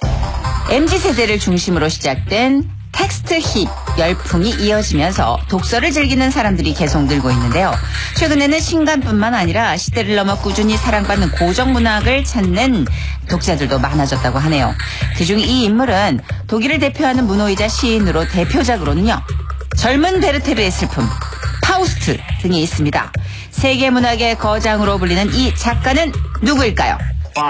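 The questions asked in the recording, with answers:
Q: 세계 문학의 거장으로 불리는 이 작가는 누구일까요?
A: 괴테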